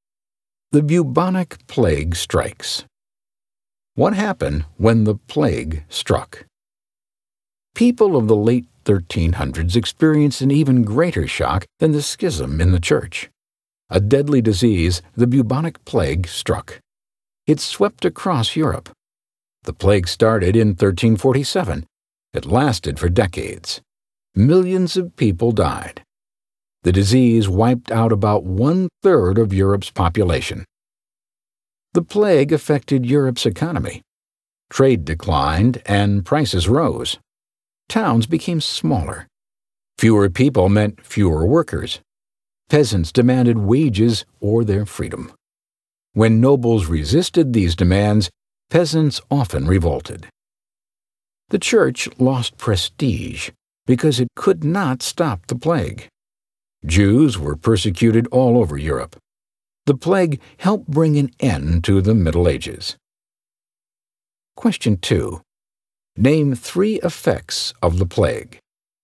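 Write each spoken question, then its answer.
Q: Name three effects of the plague.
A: Millions died (about one-third of Europe's population); trade declined and prices rose; peasants revolted; the church lost prestige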